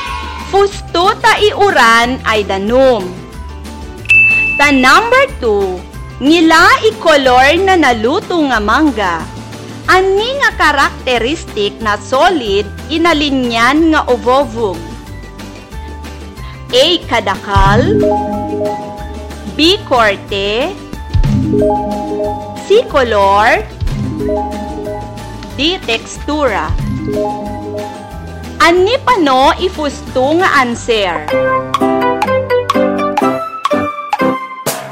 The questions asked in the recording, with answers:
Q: Ani nga karakteristik na solid inalinyan nga ovovog?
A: Letra C.